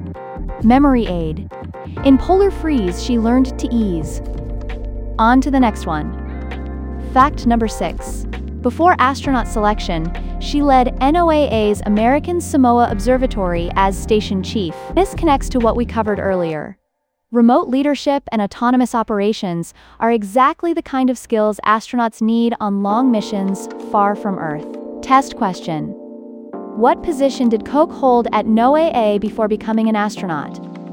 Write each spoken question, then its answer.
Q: What position did Koch hold at NOAA before becoming an astronaut?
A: Correct answer, station chief.